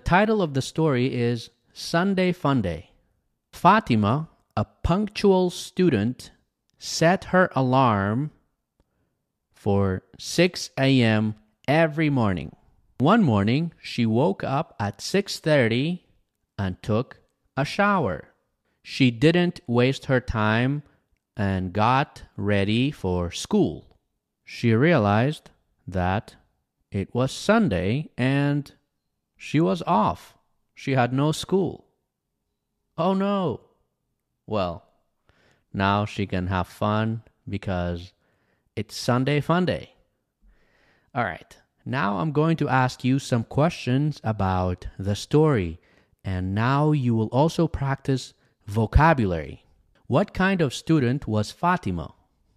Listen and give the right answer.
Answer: She was a punctual student.